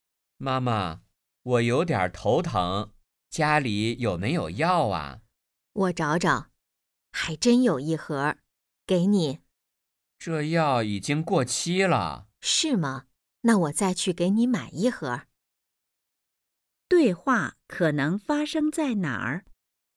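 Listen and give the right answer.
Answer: 家里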